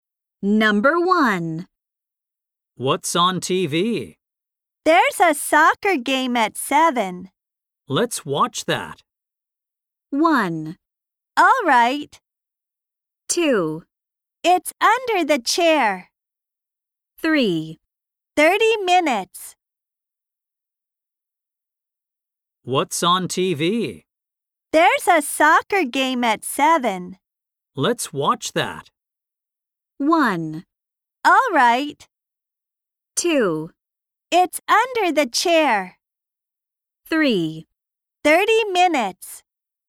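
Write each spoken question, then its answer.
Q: Let's watch that.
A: 1: All right.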